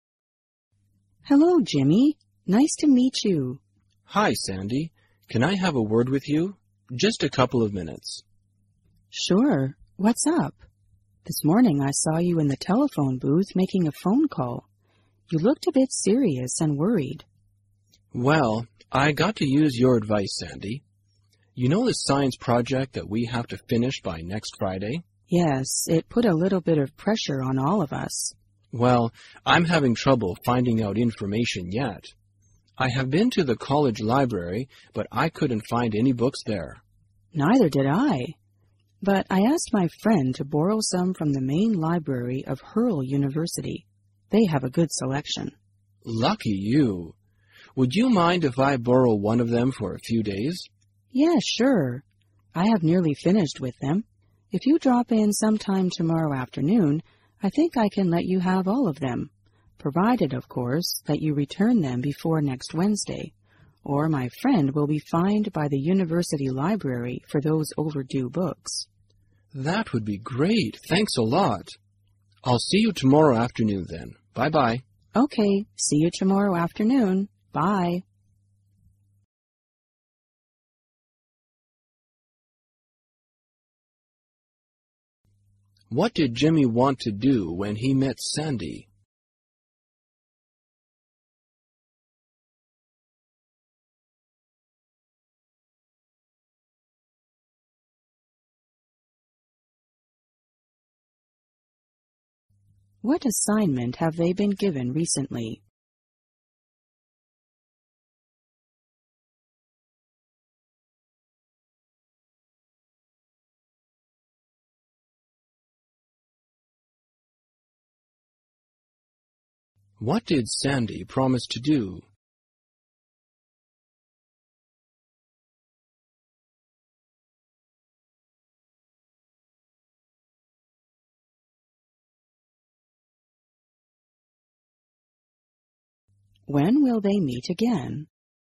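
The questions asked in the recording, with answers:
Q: What did Jimmy want to do when he met Sandy?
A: Ask Sandy for advice

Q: What assignment have they been given recently?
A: A science project due next Friday

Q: What did Sandy promise to do?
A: Lend Jimmy the books from the Hurl University library

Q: When will they meet again?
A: Tomorrow afternoon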